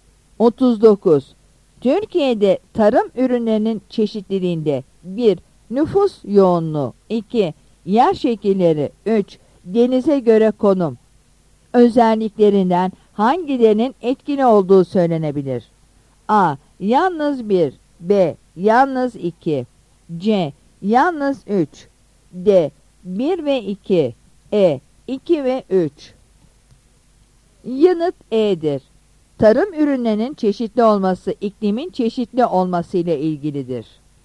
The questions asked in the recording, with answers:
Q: Denize göre konum özelliklerinden hangilerinin etkili olduğu söylenebilir?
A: Yanıt E'dir.